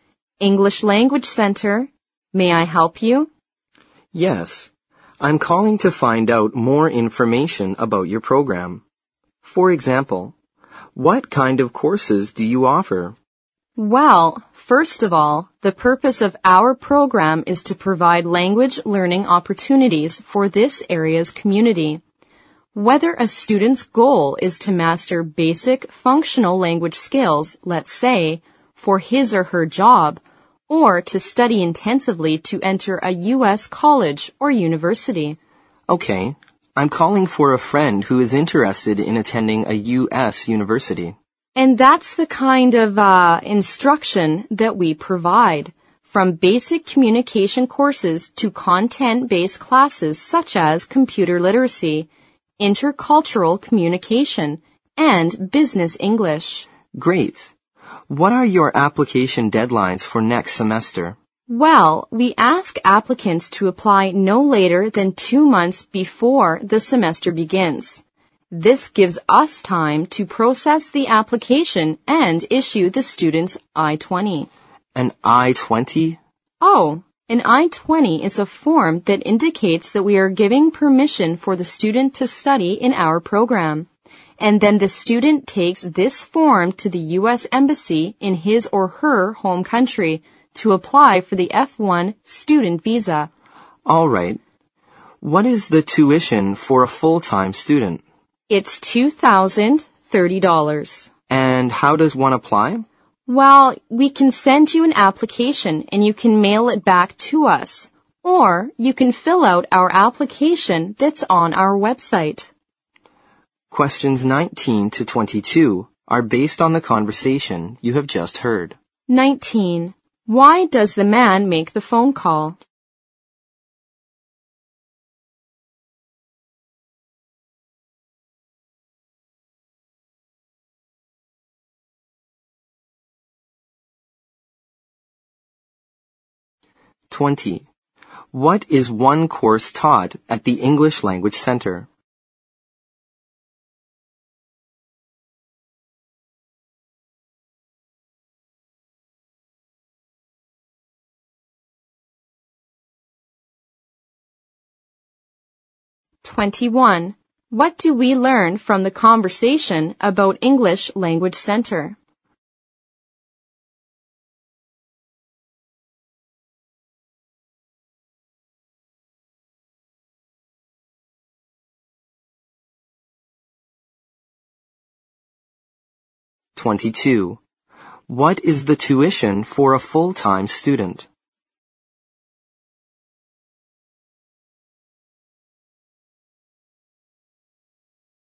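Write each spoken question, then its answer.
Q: Why does the man make the phone call?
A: To get information about the program for a friend who wants to attend a U.S. university

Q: What is one course taught at the English Language Center?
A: Computer literacy (also intercultural communication or business English)

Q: What is the tuition for a full-time student?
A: $2,030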